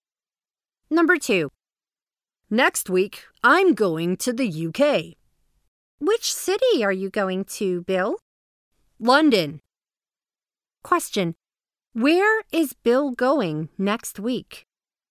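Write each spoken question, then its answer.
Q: Where is Bill going next week?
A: London, the UK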